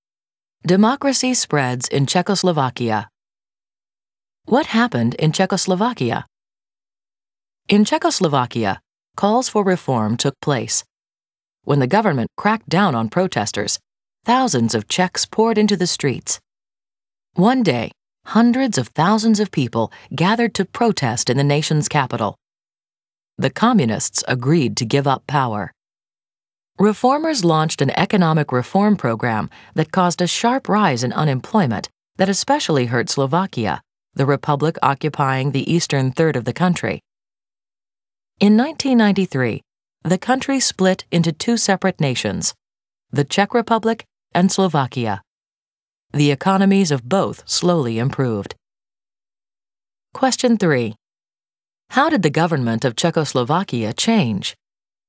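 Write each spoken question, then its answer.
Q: How did the government of Czechoslovakia change?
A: Communists gave up power after protests; in 1993 the country split into the Czech Republic and Slovakia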